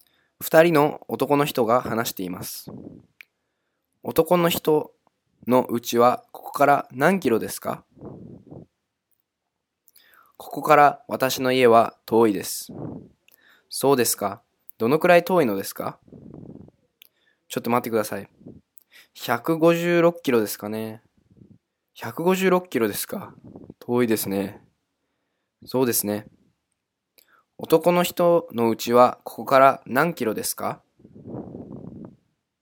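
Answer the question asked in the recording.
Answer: 156キロ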